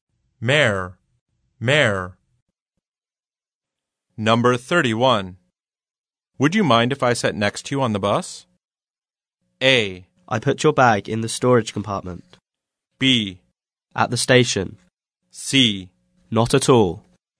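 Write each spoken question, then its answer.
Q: Would you mind if I sat next to you on the bus?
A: C: Not at all.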